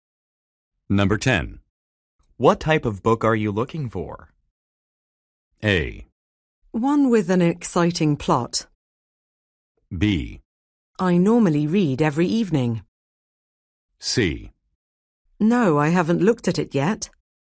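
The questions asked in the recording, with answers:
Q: What type of book are you looking for?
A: A: One with an exciting plot.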